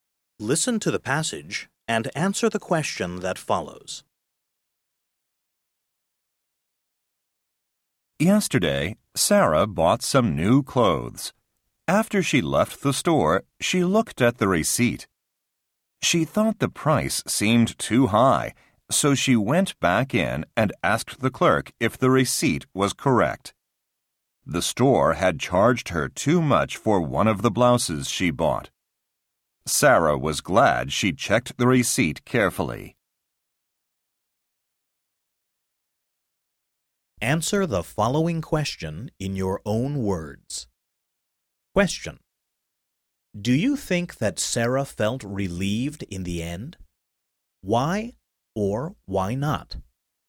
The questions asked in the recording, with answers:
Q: Do you think that Sarah felt relieved in the end? Why or why not?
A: Yes, I do. Because by checking the receipt carefully, she found the shop had charged her too much.